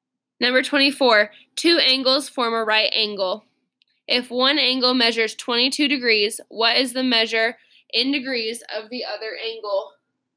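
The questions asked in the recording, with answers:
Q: If one angle measures 22 degrees, what is the measure in degrees of the other angle?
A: 68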